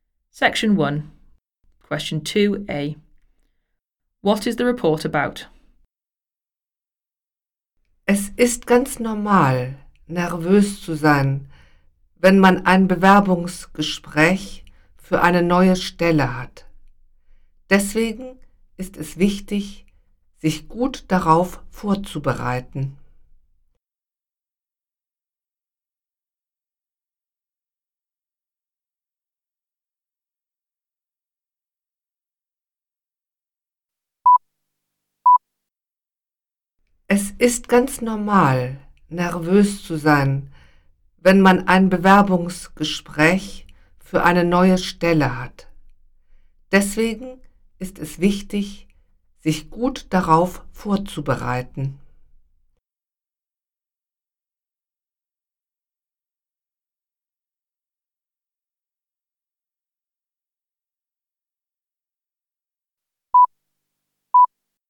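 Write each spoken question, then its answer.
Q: What is the report about?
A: Preparing for a job interview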